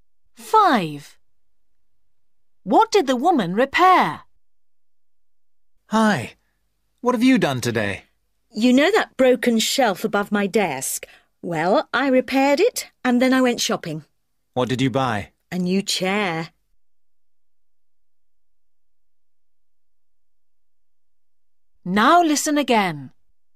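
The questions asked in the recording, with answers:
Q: What did the woman repair?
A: A shelf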